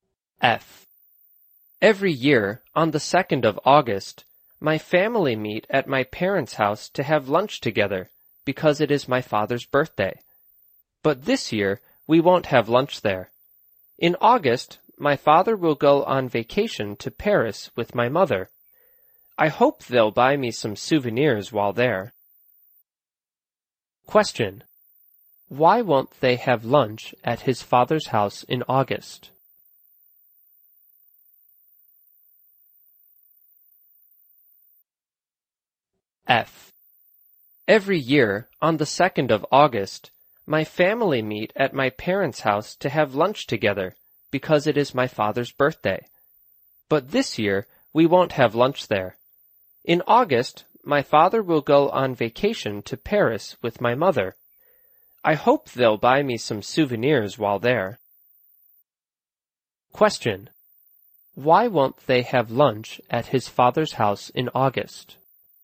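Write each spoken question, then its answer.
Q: Why won't they have lunch at his father's house in August?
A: Because his father will go on vacation to Paris with his mother.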